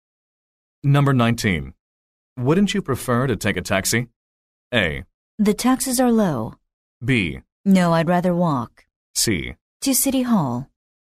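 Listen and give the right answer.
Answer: B: No, I'd rather walk.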